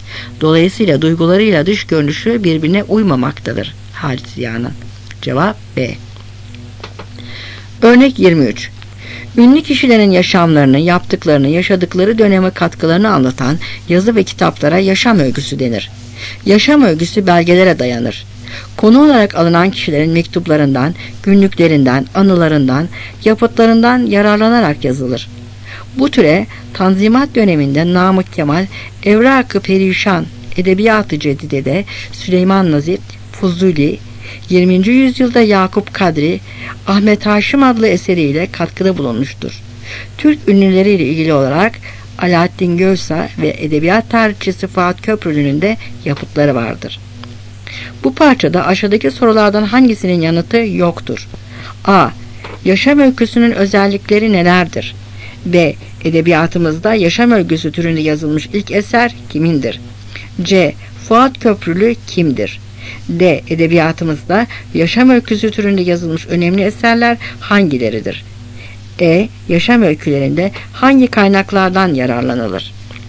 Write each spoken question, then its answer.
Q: Bu parçada aşağıdaki sorulardan hangisinin yanıtı yoktur?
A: Cevap B.